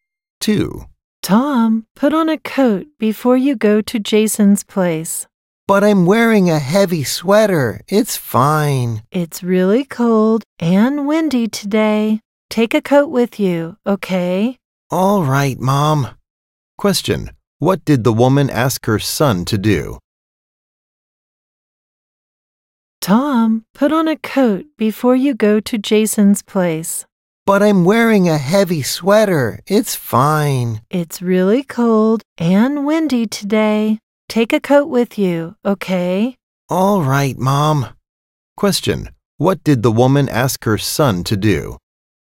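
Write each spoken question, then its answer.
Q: What did the woman ask her son to do?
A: Put on or take a coat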